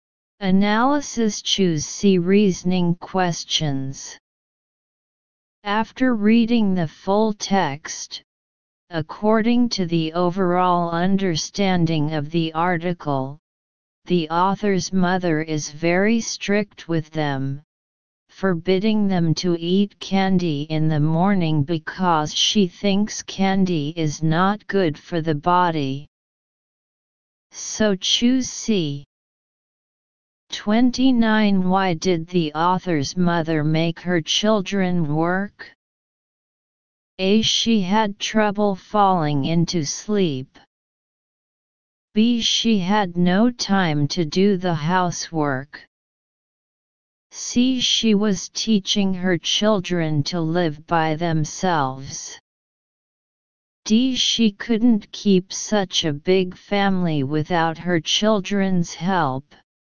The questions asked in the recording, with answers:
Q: Why did the author's mother make her children work?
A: Analysis. Choose C.